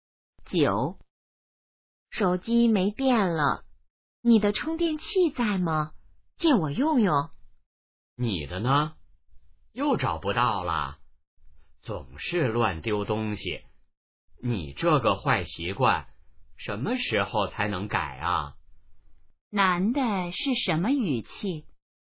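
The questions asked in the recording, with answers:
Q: 男的是什么语气?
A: 责备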